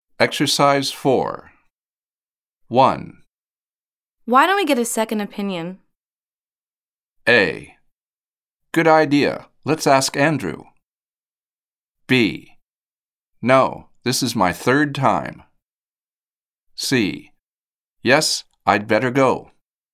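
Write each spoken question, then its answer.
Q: Why don't we get a second opinion?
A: A: Good idea. Let's ask Andrew.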